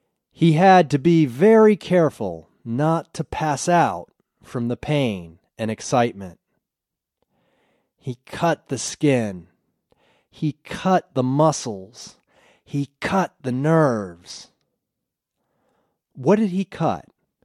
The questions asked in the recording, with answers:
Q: What did he cut?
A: He cut the skin, the muscles, and the nerves.